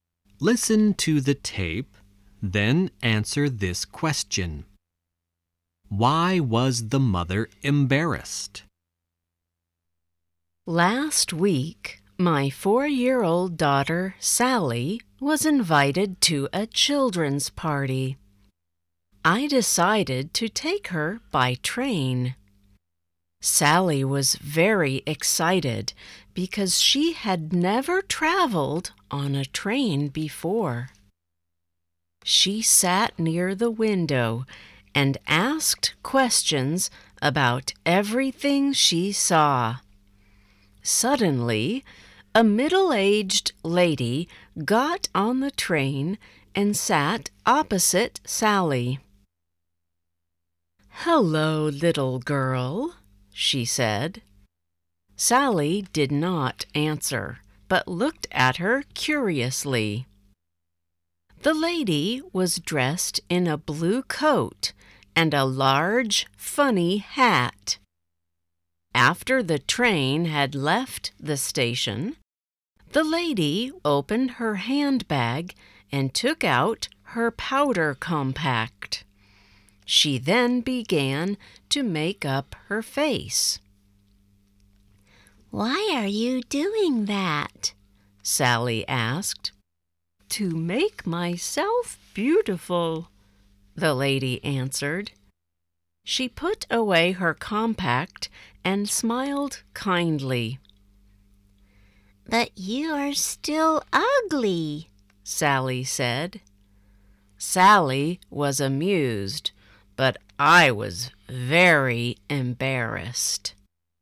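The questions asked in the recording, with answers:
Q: Why was the mother embarrassed?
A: Because Sally told the lady she was still ugly.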